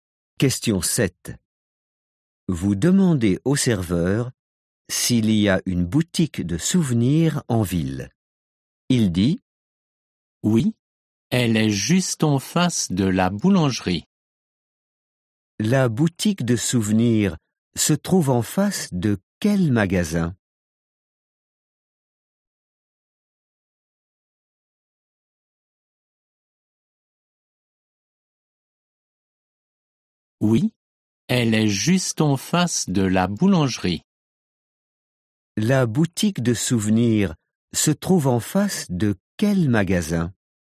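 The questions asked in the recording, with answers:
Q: La boutique de souvenirs se trouve en face de quel magasin ?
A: La boulangerie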